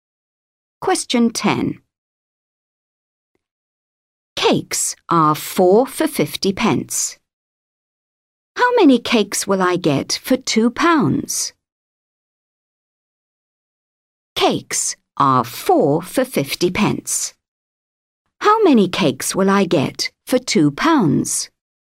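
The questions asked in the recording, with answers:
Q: Cakes are 4 for 50p. How many cakes will I get for £2?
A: 16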